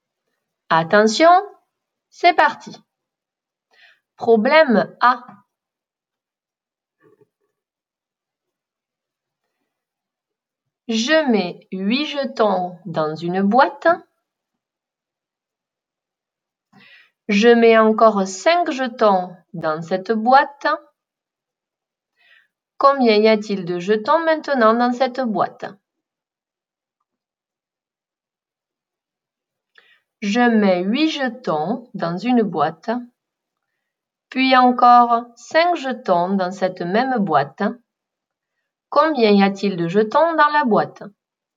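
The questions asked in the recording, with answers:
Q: Combien y a-t-il de jetons dans la boîte?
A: 13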